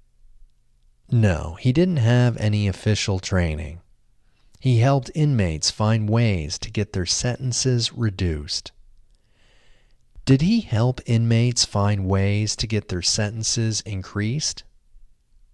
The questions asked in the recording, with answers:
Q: Did he help inmates find ways to get their sentences increased?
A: No, he didn't help inmates find ways to get their sentences increased.